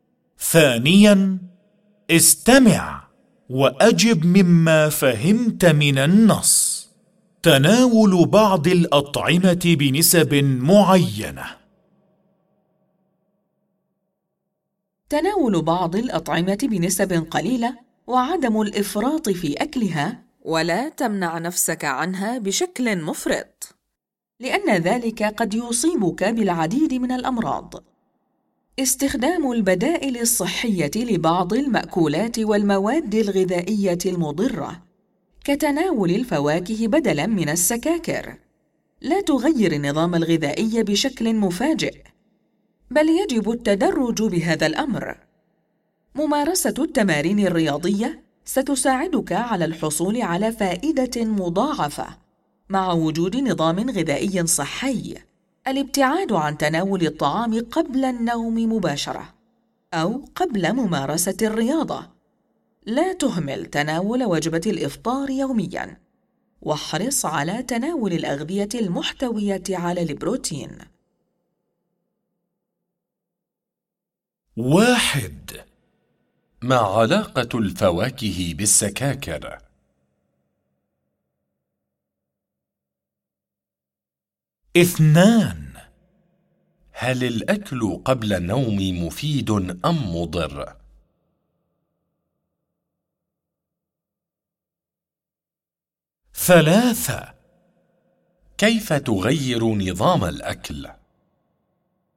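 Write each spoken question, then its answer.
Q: ما علاقة الفواكه بالسكاكر؟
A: الفواكه بديل صحي للسكاكر

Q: هل الأكل قبل النوم مفيد أم مضر؟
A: مضر

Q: كيف تغير نظام الأكل؟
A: بالتدريج، لا بشكل مفاجئ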